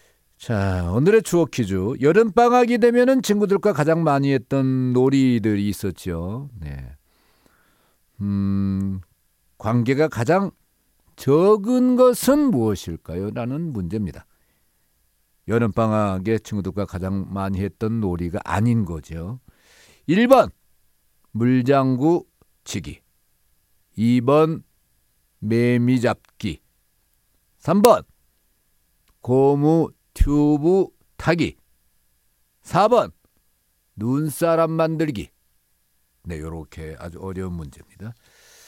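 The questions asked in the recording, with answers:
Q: 관계가 가장 적은 것은 무엇일까요?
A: 4: 눈사람 만들기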